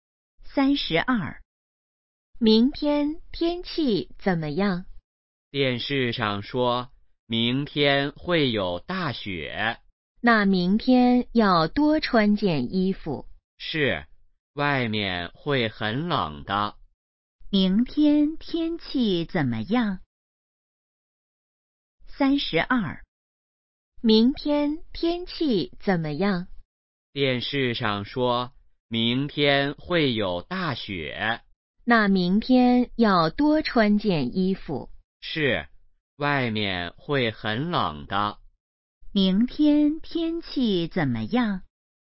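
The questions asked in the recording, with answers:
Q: 明天天气怎么样?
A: 会有大雪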